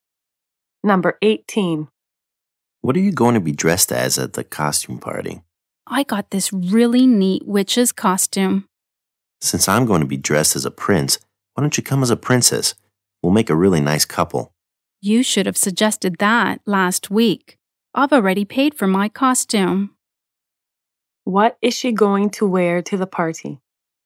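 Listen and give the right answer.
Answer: A witch's costume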